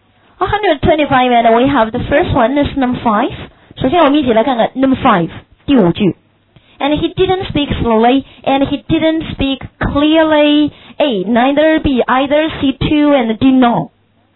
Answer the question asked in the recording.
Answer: and B is right.